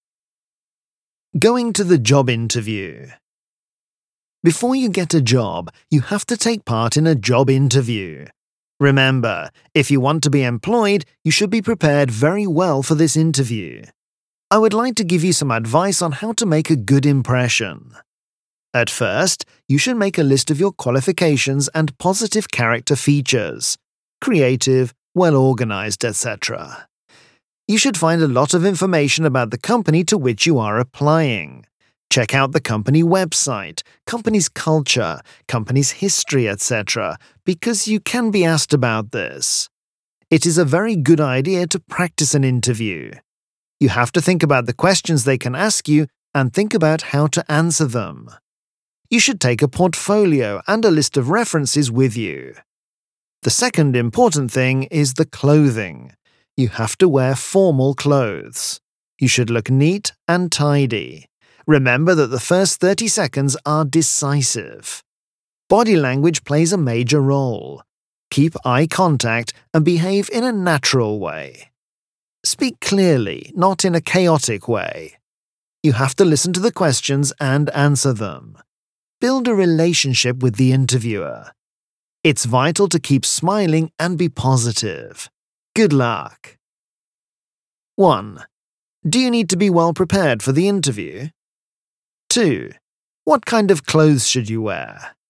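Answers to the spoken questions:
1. Yes, you should be prepared very well.
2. Formal clothes; you should look neat and tidy.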